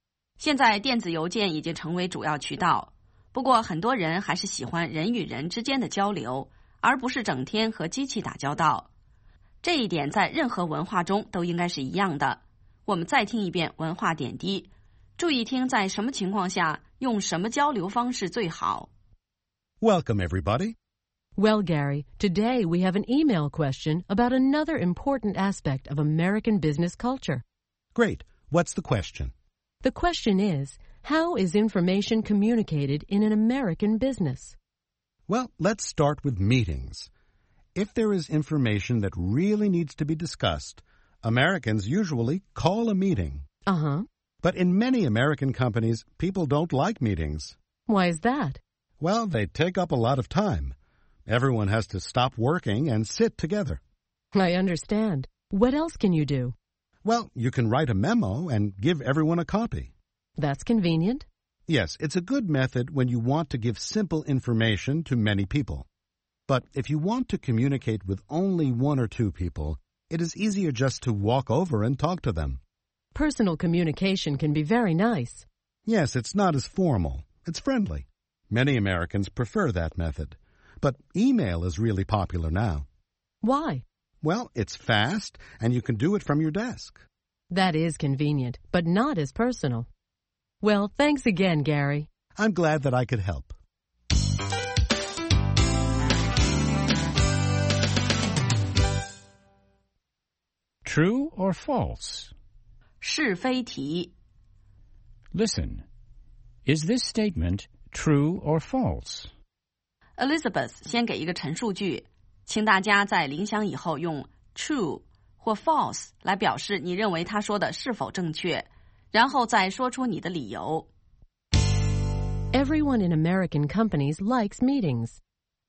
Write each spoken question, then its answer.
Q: Everyone in American companies likes meetings.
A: False.Many people think that meetings take up too much time.